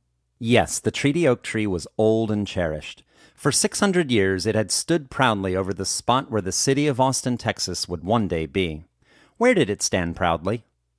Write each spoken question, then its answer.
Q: Where did it stand proudly?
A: It stood proudly over the spot where the city of Austin, Texas would one day be.